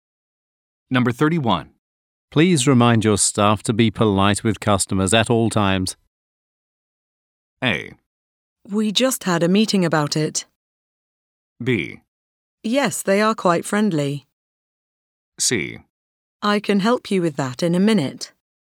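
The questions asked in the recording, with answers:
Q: Please remind your staff to be polite with customers at all times.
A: A: We just had a meeting about it.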